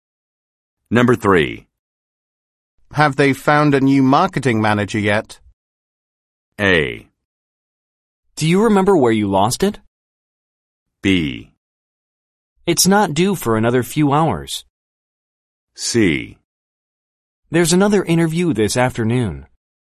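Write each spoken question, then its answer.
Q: Have they found a new marketing manager yet?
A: C: There's another interview this afternoon.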